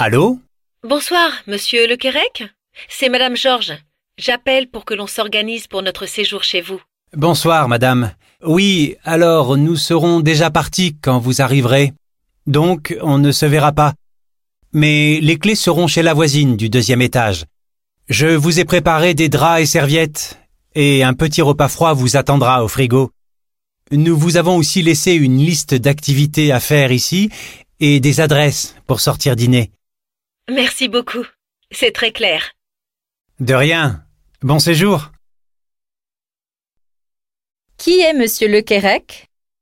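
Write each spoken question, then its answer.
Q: Qui est monsieur Le Kérec?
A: Le propriétaire du logement où Mme Georges va séjourner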